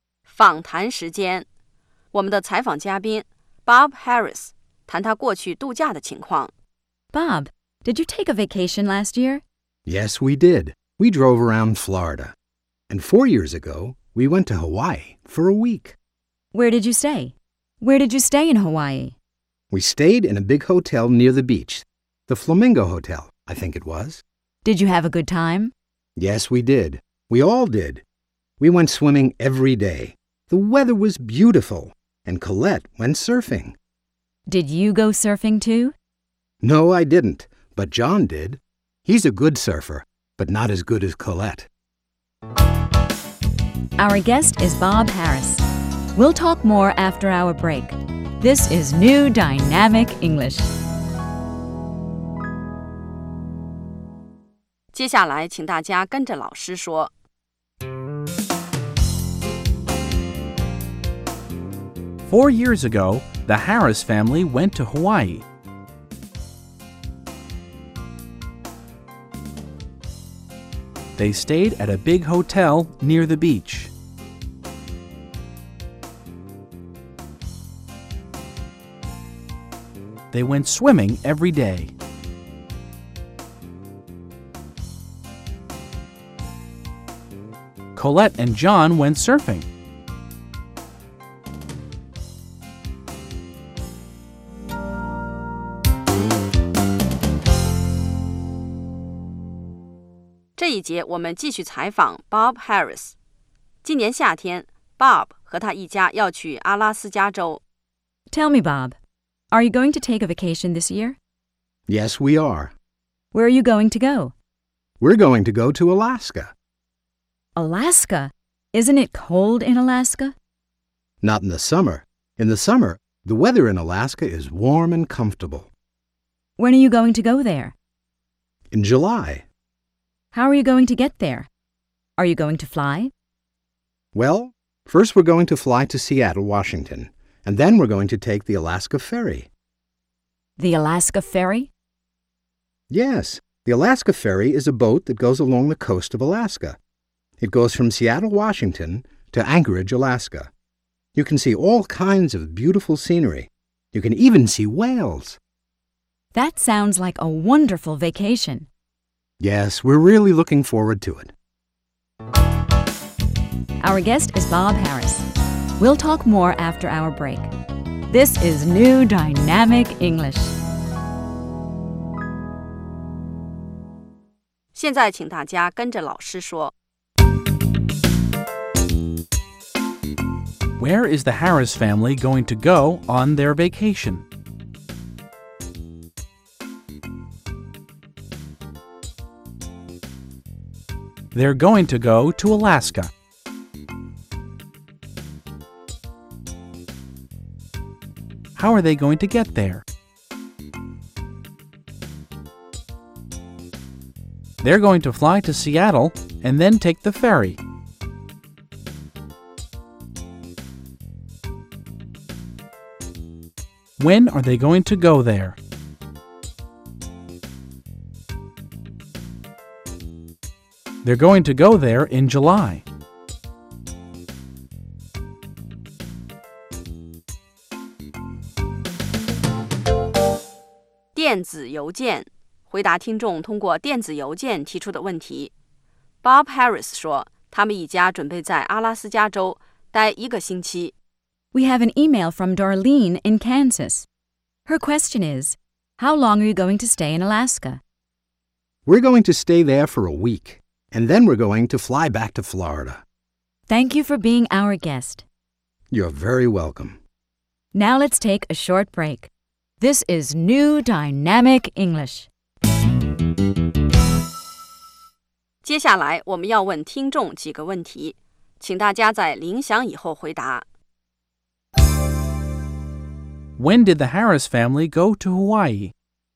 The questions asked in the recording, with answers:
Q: When did the Harris family go to Hawaii?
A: They went there 4 years ago.